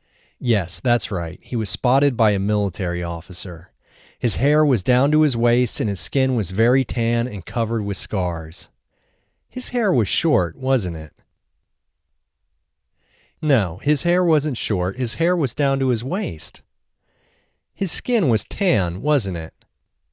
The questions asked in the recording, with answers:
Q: His skin was tan, wasn't it?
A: Yes, his skin was very tan.